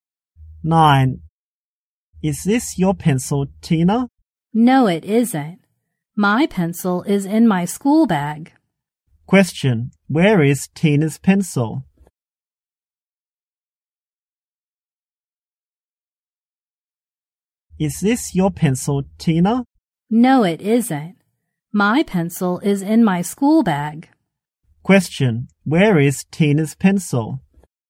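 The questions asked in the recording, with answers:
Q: Question, where is Tina's pencil?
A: In her school bag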